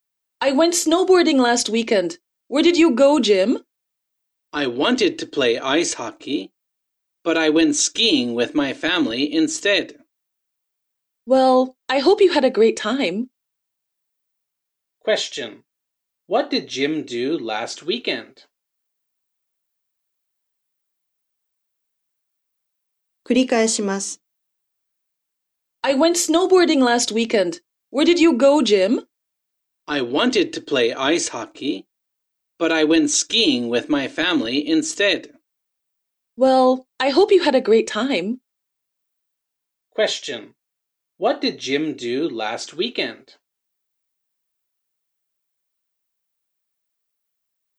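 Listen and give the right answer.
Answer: He went skiing with his family.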